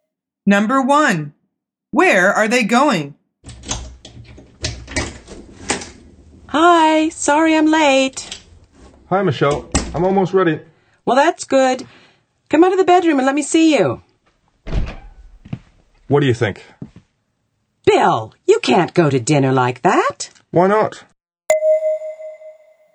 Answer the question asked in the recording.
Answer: The answer is dinner.